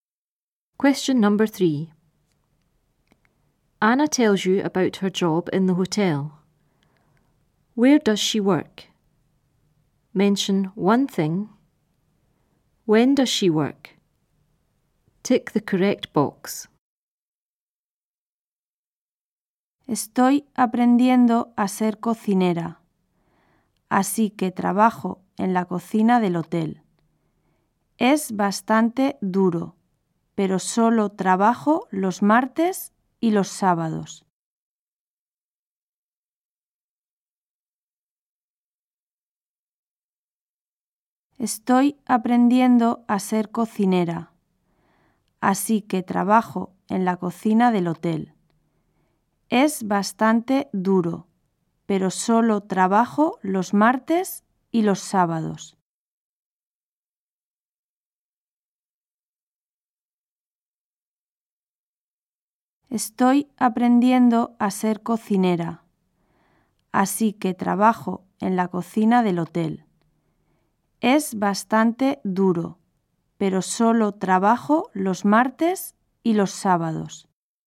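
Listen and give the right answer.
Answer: In the hotel kitchen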